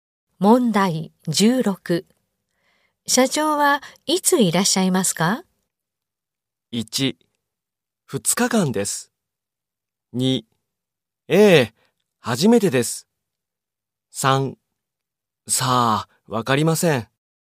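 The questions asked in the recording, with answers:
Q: 社長はいついらっしゃいますか?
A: 2: さあ、わかりません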